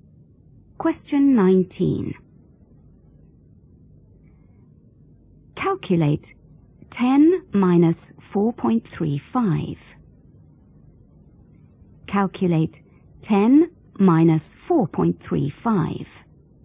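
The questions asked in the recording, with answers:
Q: Calculate 10 minus 4.35.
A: 5.65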